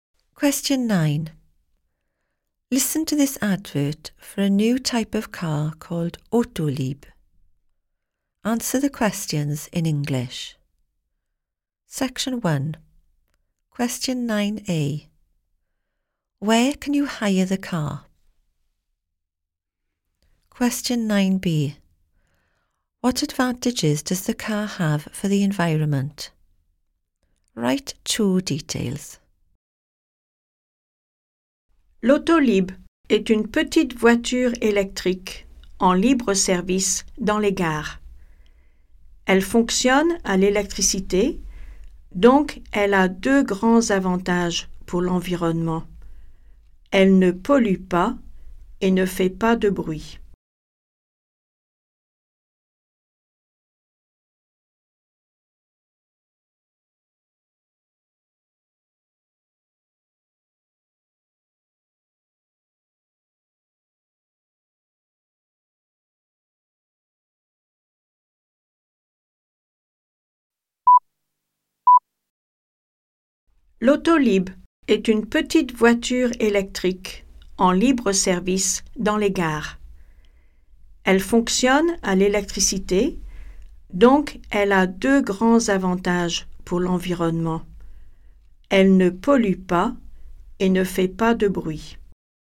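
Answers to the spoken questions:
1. At stations
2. It does not pollute and makes no noise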